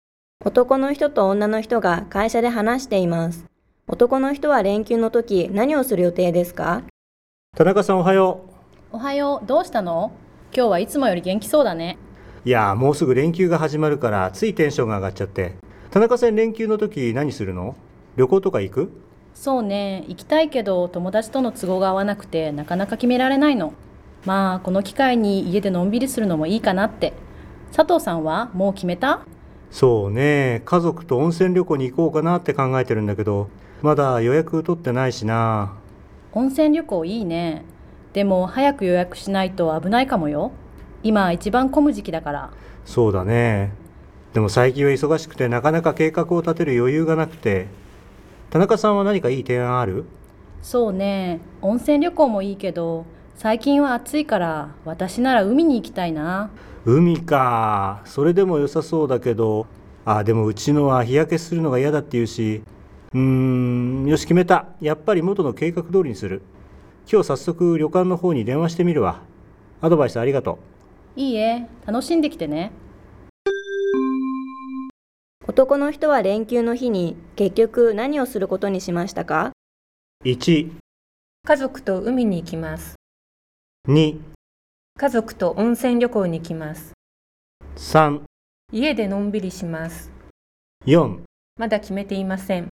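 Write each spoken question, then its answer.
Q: 男の人は連休の日に結局何をすることにしましたか?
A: 2: 家族と温泉旅行に行きます。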